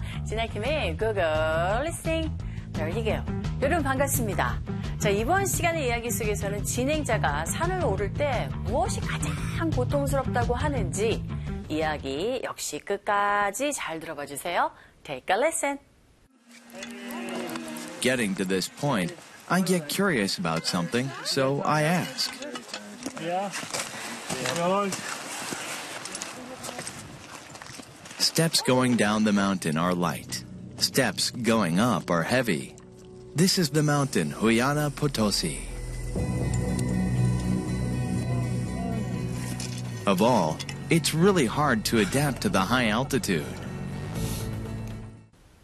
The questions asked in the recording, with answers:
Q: 진행자가 산을 오를 때 무엇이 가장 고통스럽다고 하는지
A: 바로 높은 고도에 적응하는 것이 가장 고통스러운 모습이었고